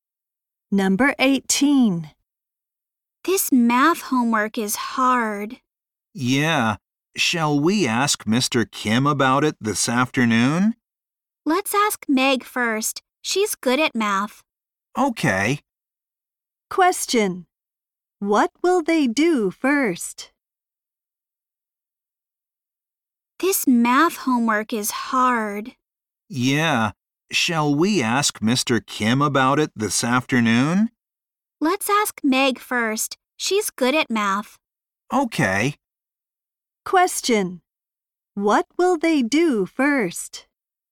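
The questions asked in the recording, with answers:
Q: What will they do first?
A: Ask Meg about the math homework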